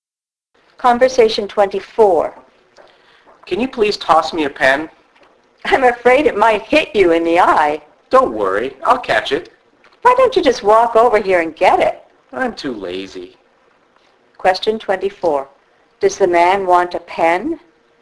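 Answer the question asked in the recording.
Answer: Yes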